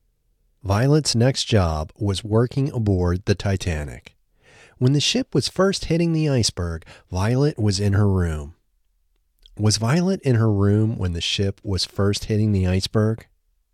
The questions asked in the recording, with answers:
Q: Was Violet in her room when the ship was first hitting the iceberg?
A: Yes, Violet was in her room when the ship was first hitting the iceberg.